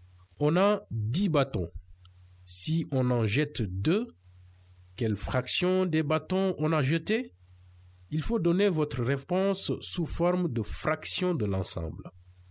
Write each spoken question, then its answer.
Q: Quelle fraction des bâtons on a jeté?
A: J'ai jeté 2/10 de mes bâtons.